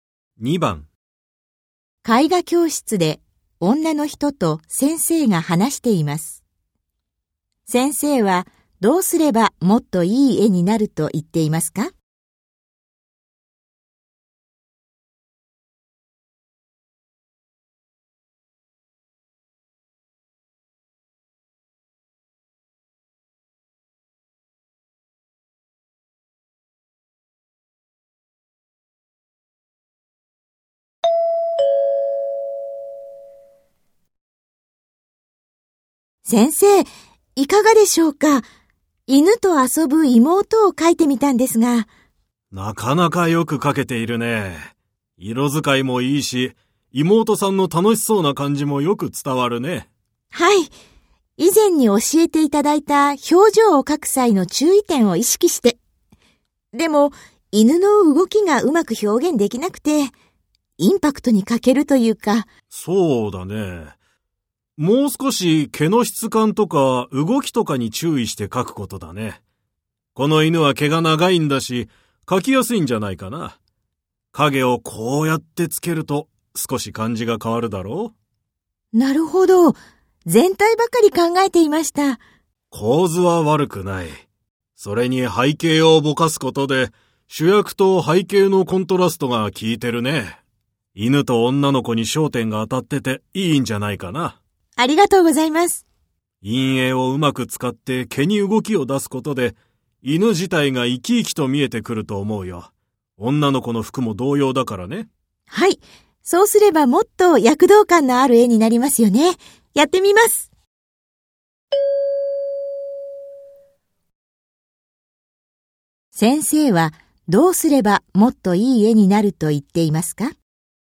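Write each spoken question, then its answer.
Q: 先生はどうすればもっといい絵になると言っていますか?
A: 陰影をうまく使って犬の毛に動きを出す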